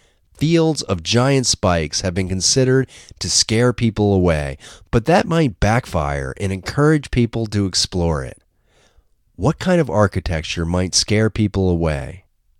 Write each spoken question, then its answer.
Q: What kind of architecture might scare people away?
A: Fields of spikes might scare people away.